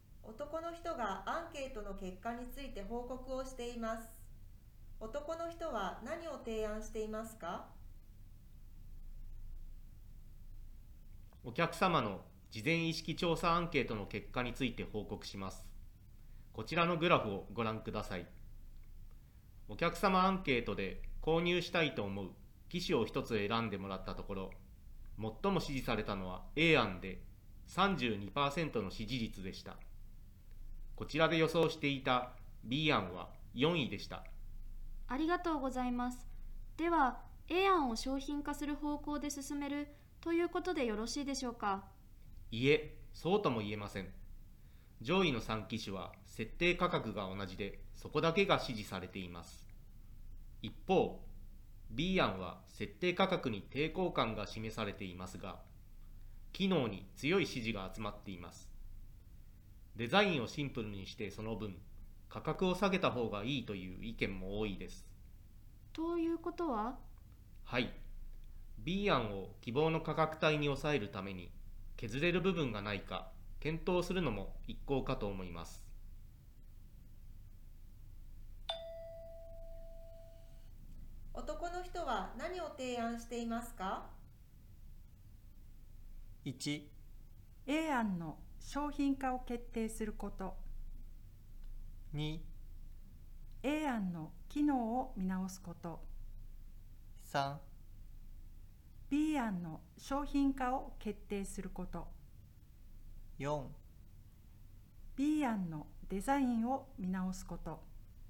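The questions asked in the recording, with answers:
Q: 男の人は何を提案していますか?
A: 4: B 案のデザインを見直すこと。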